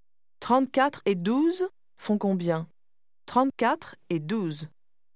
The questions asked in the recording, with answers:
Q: 34 et 12 font combien ? 34 et 12.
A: 34 et 12 font 46.